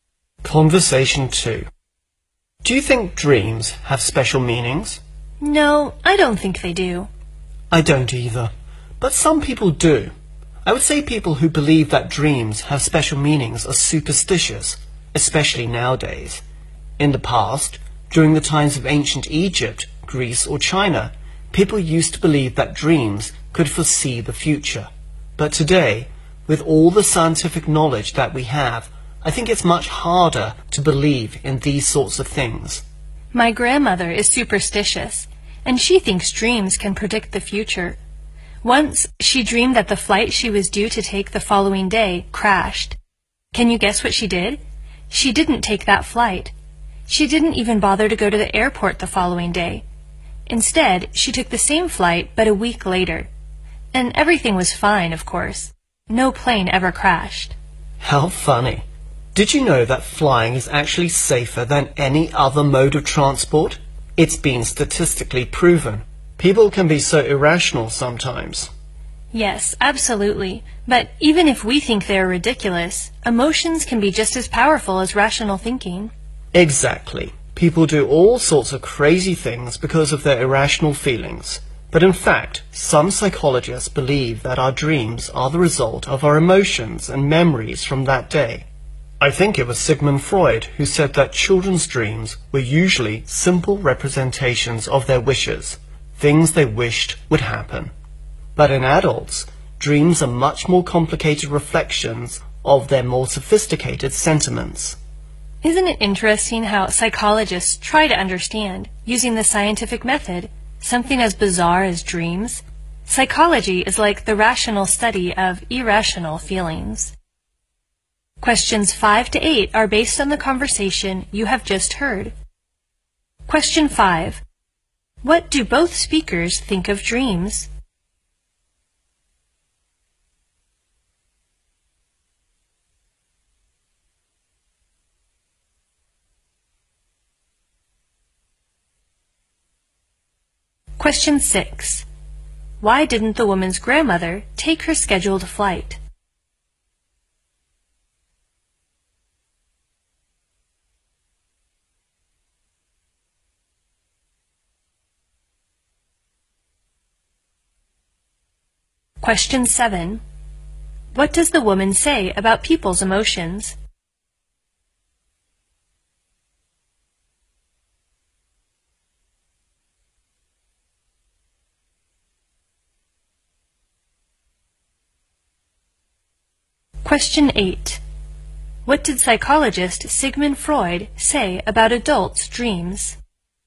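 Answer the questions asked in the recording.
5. They don't have special meanings.
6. She dreamed that the flight crashed.
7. They can be just as powerful as rational thinking.
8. They are more complicated reflections of their more sophisticated feelings.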